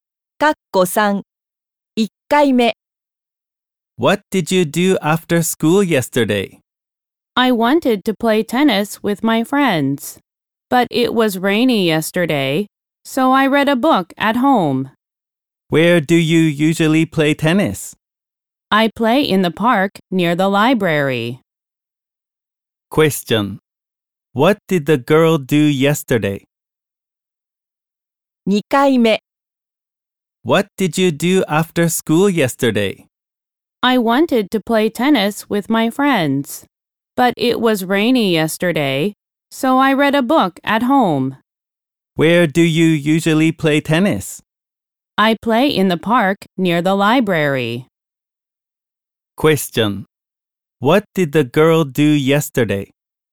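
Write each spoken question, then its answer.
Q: What did the girl do yesterday?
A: She read a book at home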